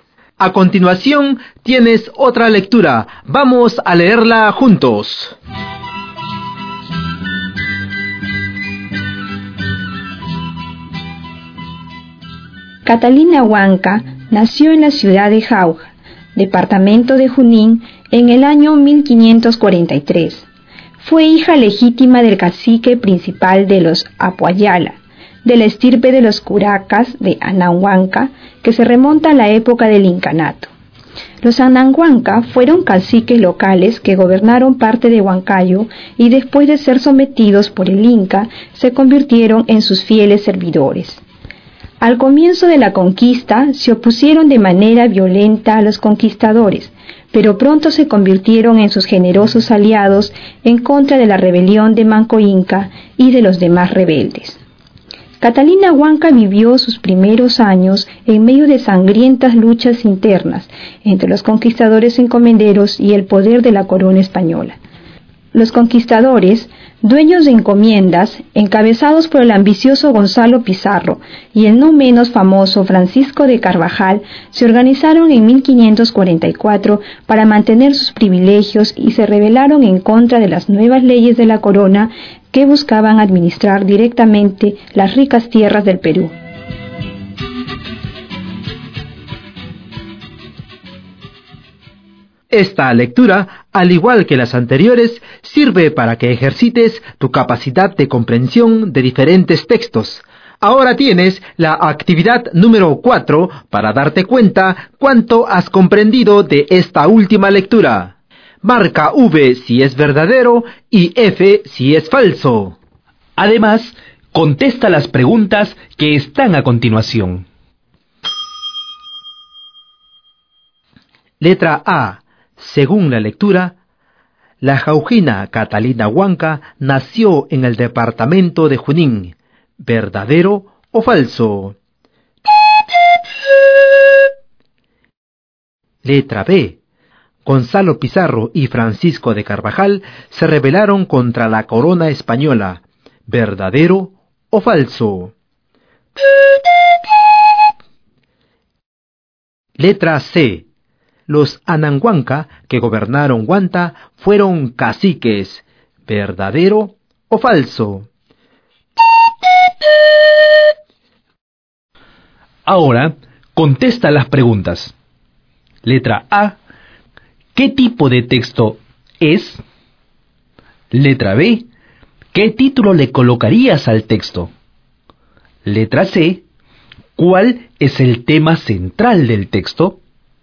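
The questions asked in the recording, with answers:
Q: Letra A. Según la lectura, la jaujina Catalina Huanca nació en el departamento de Junín.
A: Verdadero

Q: Letra B. Gonzalo Pizarro y Francisco de Carvajal se rebelaron contra la corona española.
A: Verdadero

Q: Letra C. Los Anahuanca que gobernaron Huanta fueron caciques.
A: Falso (gobernaron parte de Huancayo)

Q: Letra C. ¿Cuál es el tema central del texto?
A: La vida de Catalina Huanca, la historia de Catalina Huanca o simplemente Catalina Huanca.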